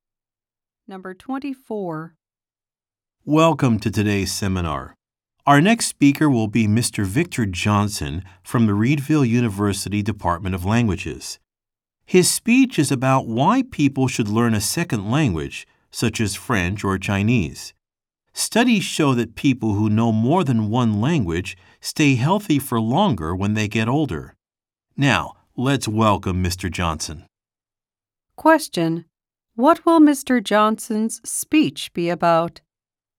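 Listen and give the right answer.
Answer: Why people should learn a second language.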